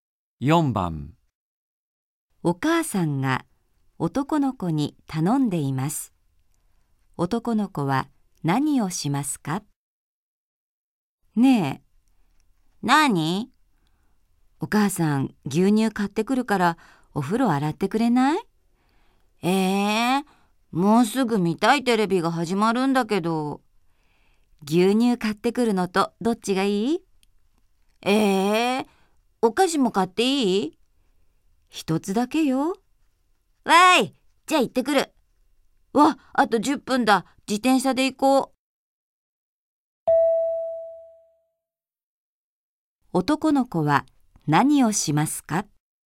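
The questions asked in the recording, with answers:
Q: 男の子は何をしますか?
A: 自転車で牛乳(とお菓子)を買いに行く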